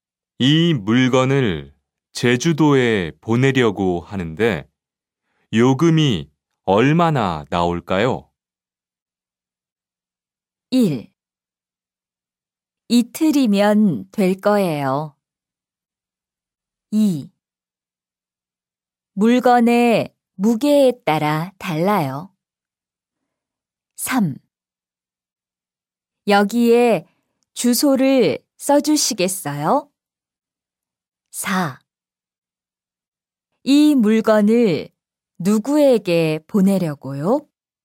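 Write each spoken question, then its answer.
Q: 이 물건을 제주도에 보내려고 하는데 요금이 얼마나 나올까요?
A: 2: 물건의 무게에 따라 달라요.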